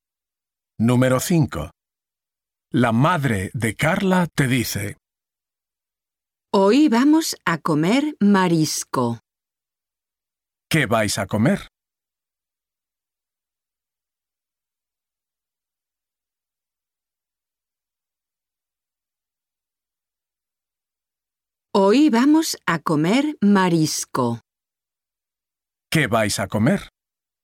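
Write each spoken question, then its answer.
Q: ¿Qué vais a comer?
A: Marisco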